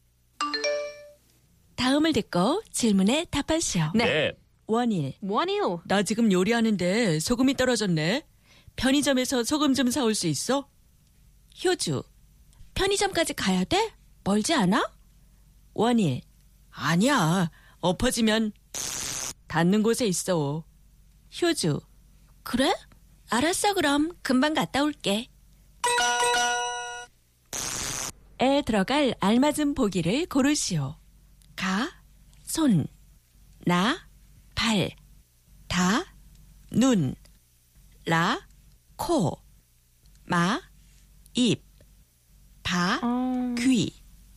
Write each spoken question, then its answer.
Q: 에 들어갈 알맞은 보기를 고르시오. 가, 손, 나, 발, 다, 눈, 라, 코, 마, 입, 바, 귀.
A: La, 코, nose. So, 아니야, 엎어지면 코 닿는 곳에 있어.